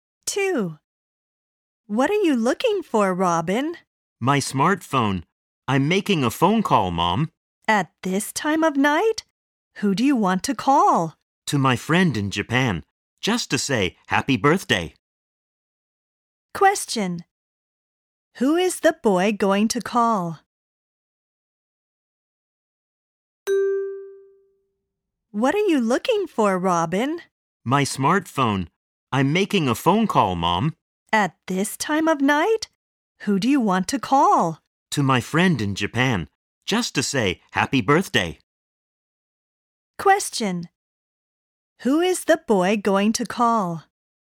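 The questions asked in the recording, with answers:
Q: Who is the boy going to call?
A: His friend in Japan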